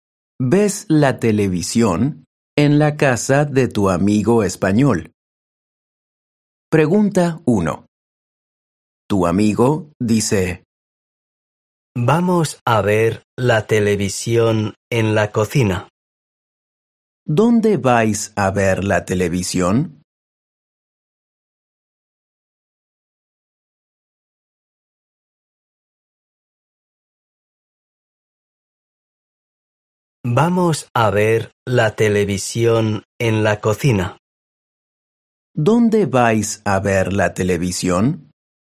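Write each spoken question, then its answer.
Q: ¿Dónde vais a ver la televisión?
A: En la cocina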